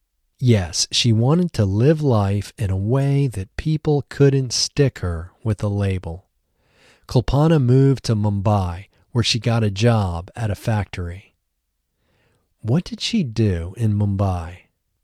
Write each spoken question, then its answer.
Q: What did she do in Mumbai?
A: In Mumbai, she got a job in a factory.